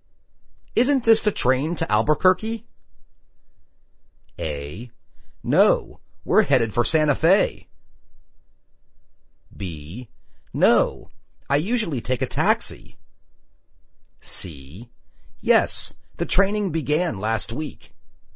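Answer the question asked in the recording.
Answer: A: No, we're headed for Santa Fe.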